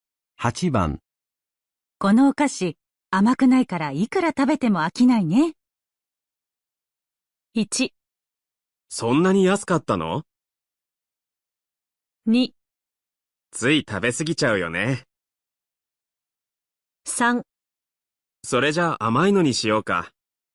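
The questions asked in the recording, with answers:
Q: このお菓子、甘くないからいくら食べても飽きないね。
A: 2: つい食べ過ぎちゃうよね。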